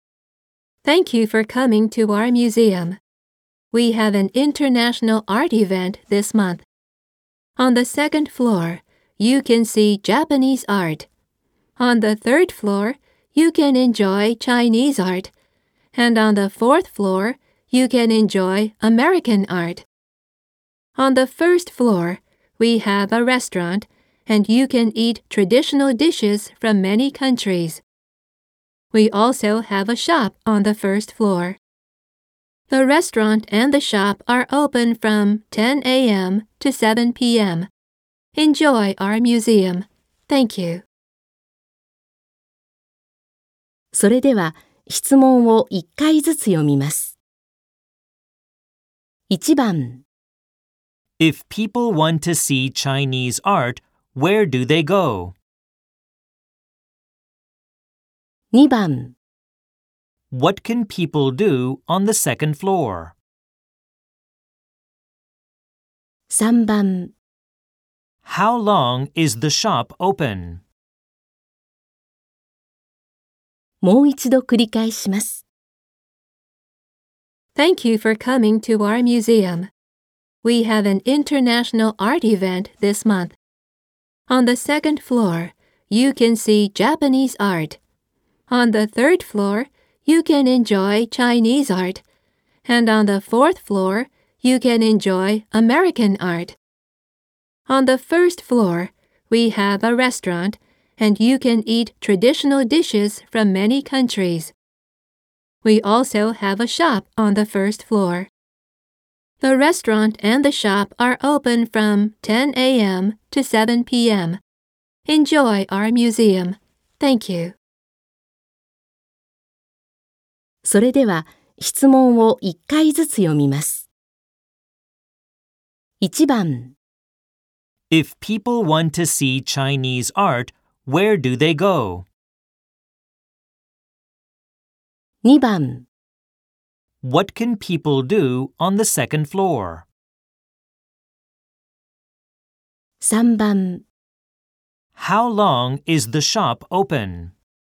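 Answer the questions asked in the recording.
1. The third floor
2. See Japanese art
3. From 10 a.m. to 7 p.m.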